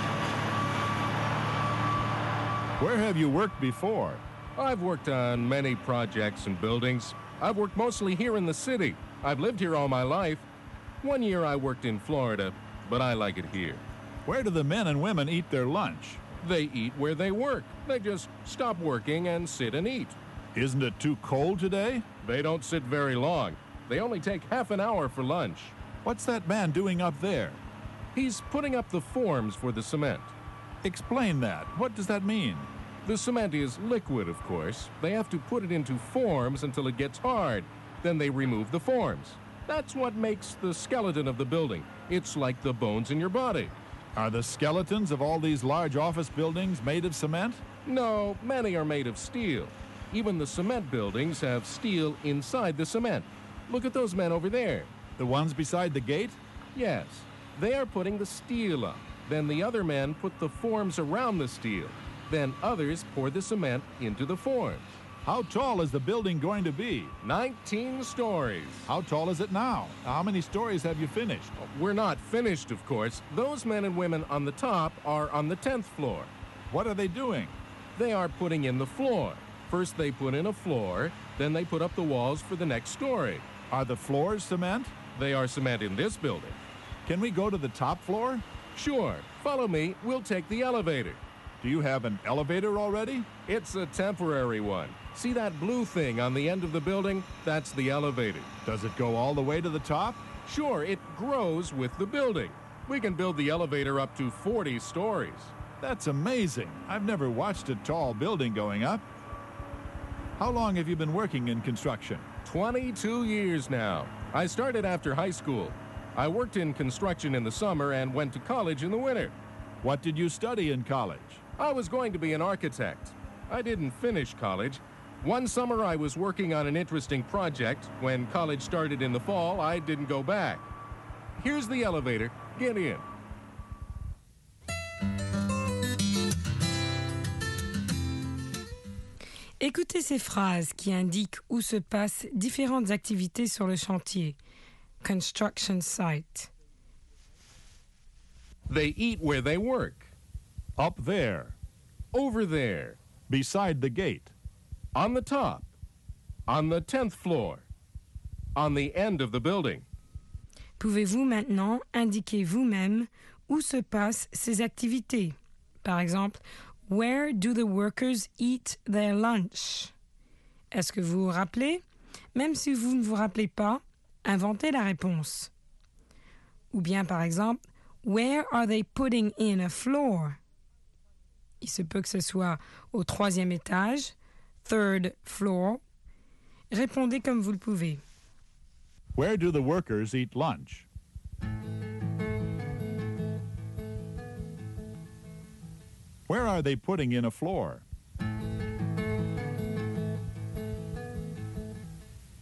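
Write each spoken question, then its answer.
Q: Where do the workers eat lunch?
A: Where they work

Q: Where are they putting in a floor?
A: On the top, on the 10th floor

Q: Where is the elevator?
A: On the end of the building

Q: Where are the workers putting the steel up?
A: Beside the gate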